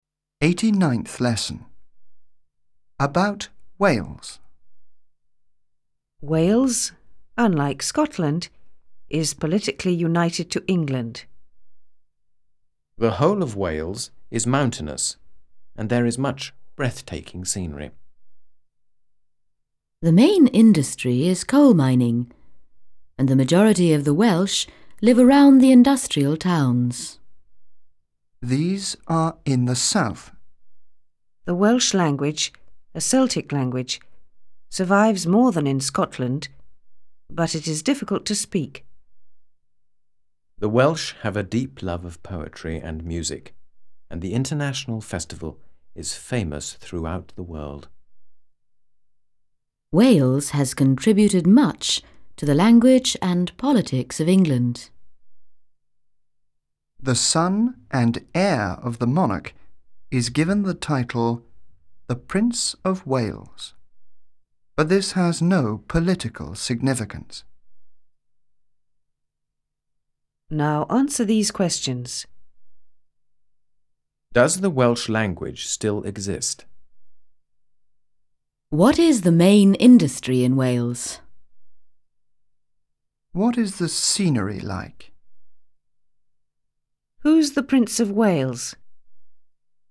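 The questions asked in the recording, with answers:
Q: Does the Welsh language still exist?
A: Yes, it survives more than in Scotland.

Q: What is the main industry in Wales?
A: Coal mining

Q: What is the scenery like?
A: Mountainous and breathtaking

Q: Who's the Prince of Wales?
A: The son and heir of the monarch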